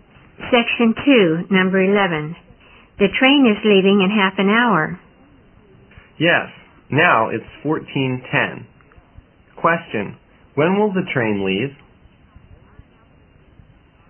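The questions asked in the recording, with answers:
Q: when will the train leave?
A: At 14:40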